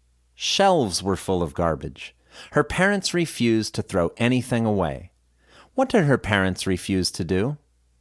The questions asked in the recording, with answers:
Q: What did her parents refuse to do?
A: Her parents refused to throw anything away, yet they accumulated more and more.